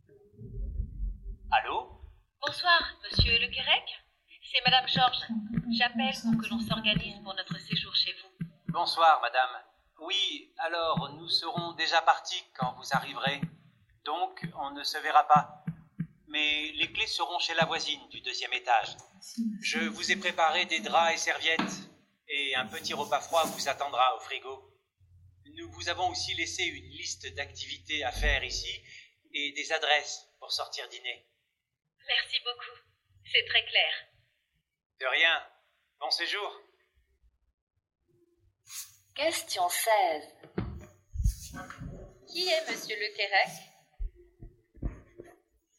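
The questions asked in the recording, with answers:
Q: Qui est monsieur Le Querec?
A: Le propriétaire du logement où Mme Georges va séjourner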